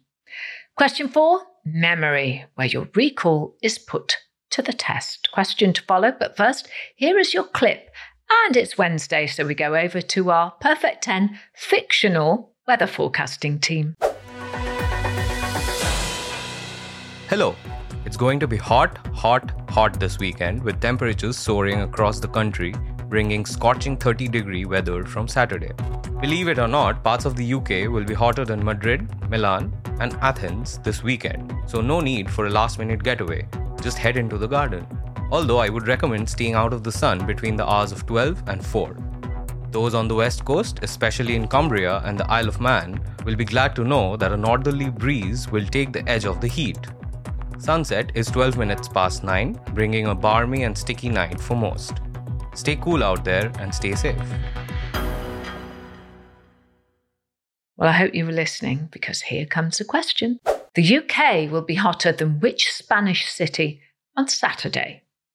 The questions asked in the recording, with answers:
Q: The UK will be hotter than which Spanish city on Saturday?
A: The answer in our fictional weather forecast was Madrid.